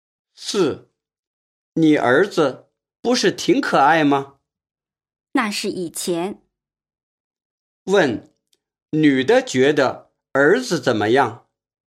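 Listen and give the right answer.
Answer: 现在不可爱了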